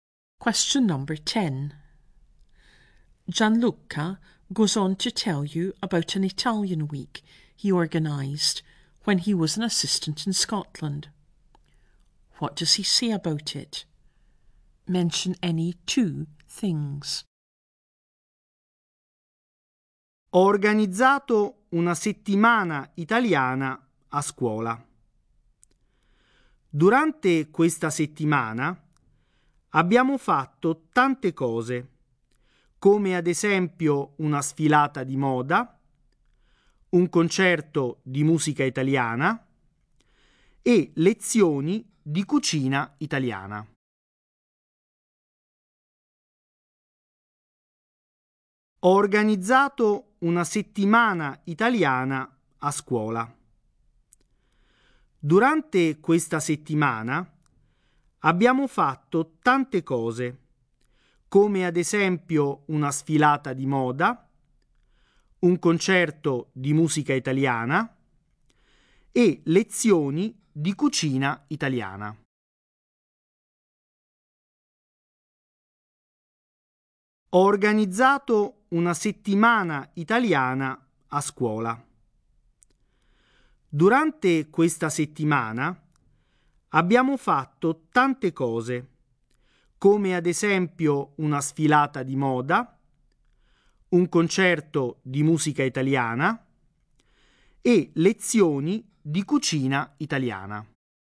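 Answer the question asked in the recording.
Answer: They did a fashion show, a concert of Italian music and Italian cookery lessons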